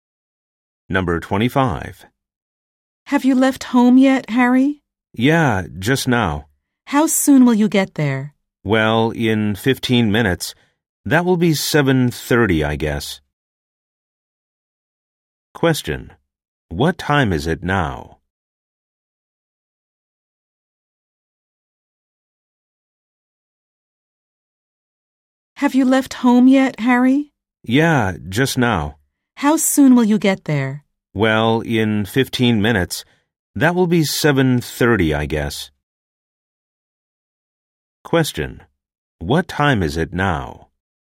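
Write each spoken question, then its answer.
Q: What time is it now?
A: 7:15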